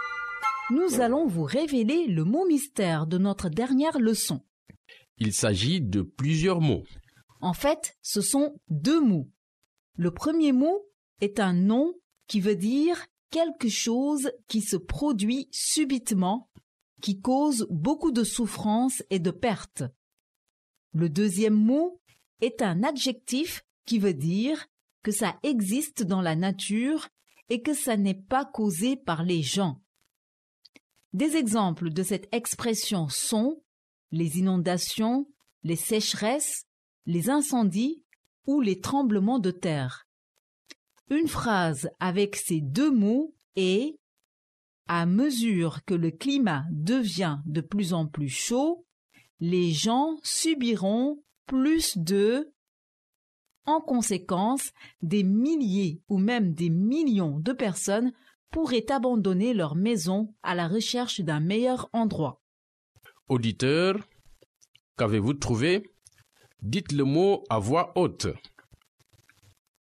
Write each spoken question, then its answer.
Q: Auditeur, qu'avez-vous trouvé?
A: Le mot mystère d'aujourd'hui est catastrophe naturelle.